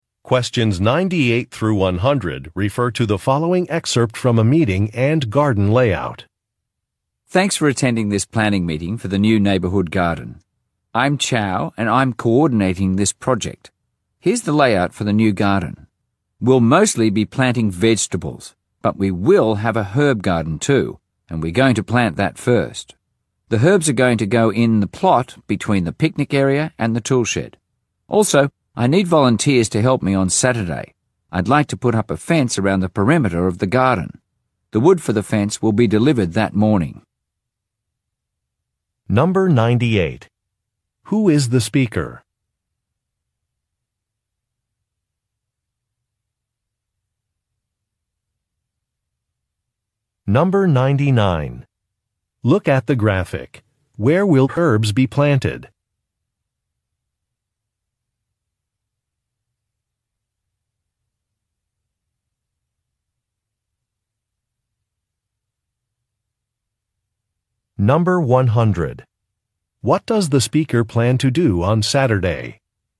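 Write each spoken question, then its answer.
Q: Who is the speaker?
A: A project coordinator for a new neighborhood garden

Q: What does the speaker plan to do on Saturday?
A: Put up a fence around the garden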